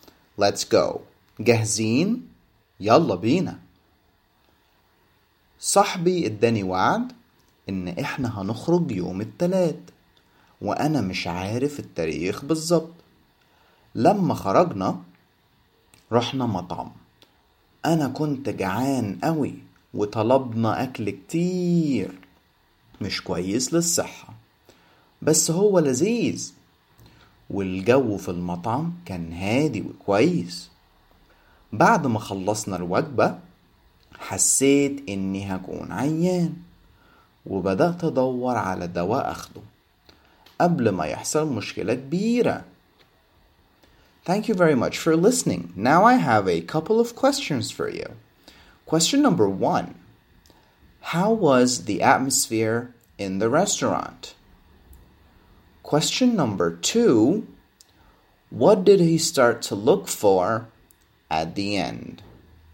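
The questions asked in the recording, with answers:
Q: How was the atmosphere in the restaurant?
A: Calm and nice

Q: What did he start to look for at the end?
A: Medicine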